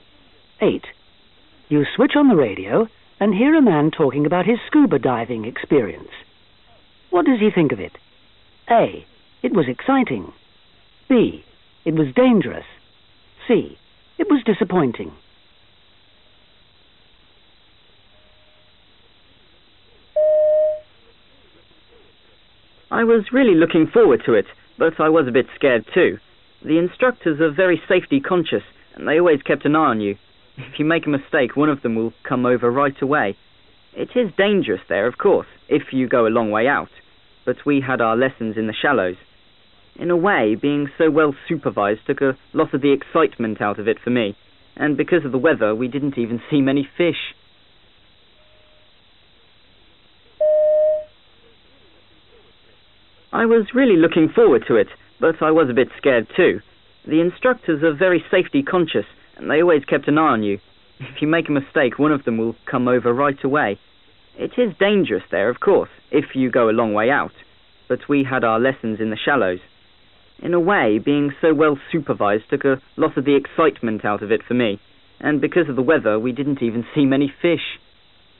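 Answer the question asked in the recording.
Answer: C: It was disappointing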